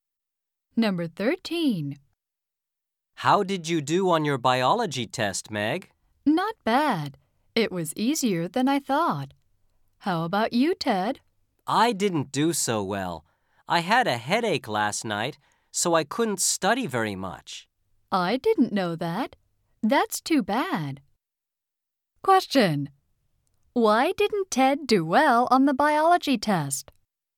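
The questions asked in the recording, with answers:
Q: Why didn't Ted do well on the biology test?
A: He had a headache and couldn't study much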